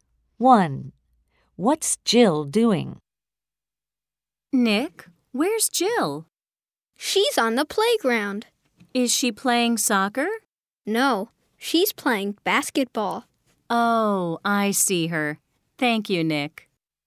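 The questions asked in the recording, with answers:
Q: What's Jill doing?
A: Playing basketball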